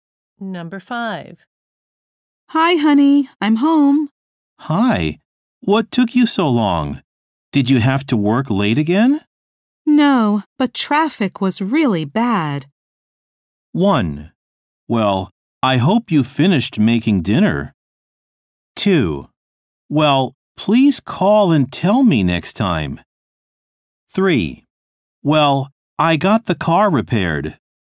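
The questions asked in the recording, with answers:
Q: No, but traffic was really bad.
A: 2: Well, please call and tell me next time.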